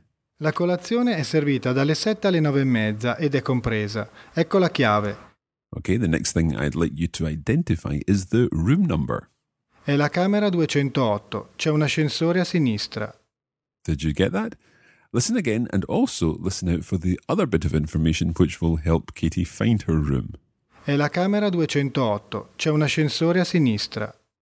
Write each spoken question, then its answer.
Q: Okay, the next thing I'd like you to identify is the room number.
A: So the room number is 208.